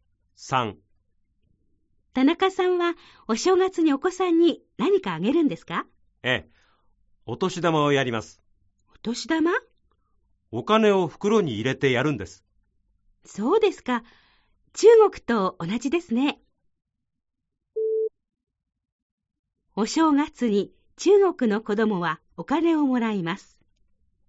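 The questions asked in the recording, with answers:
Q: お正月に中国の子供はお金をもらいます。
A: ○(正しい)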